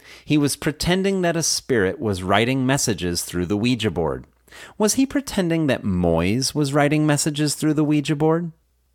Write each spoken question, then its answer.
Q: Was he pretending that Moyes was writing messages through the Ouija board?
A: No, he wasn't pretending that Moyes was writing messages through the Ouija board.